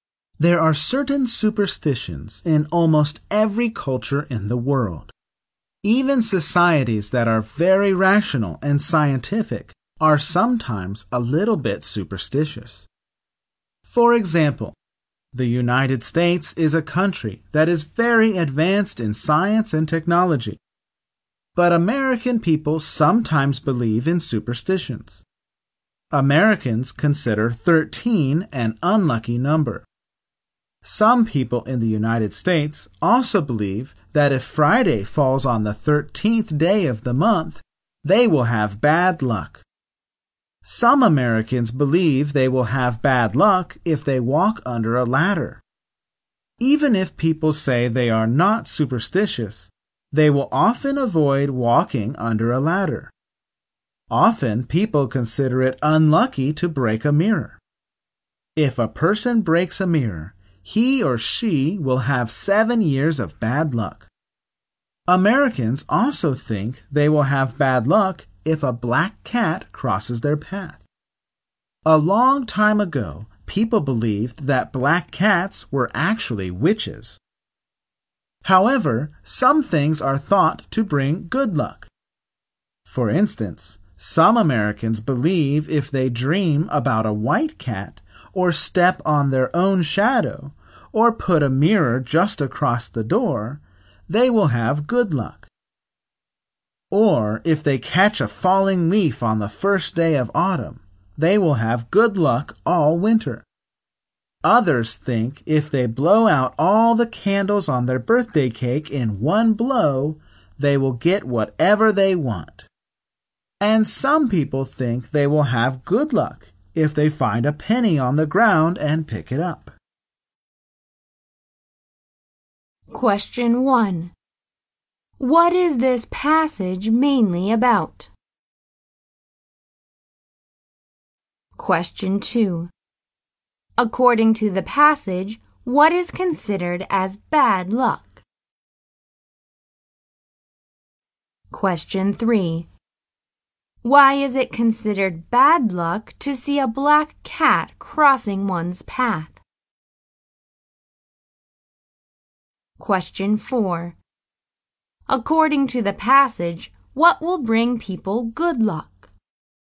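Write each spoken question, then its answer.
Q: What is this passage mainly about?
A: Superstitions in the United States.

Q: Why is it considered bad luck to see a black cat crossing one's path?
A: Long ago, people believed black cats were witches.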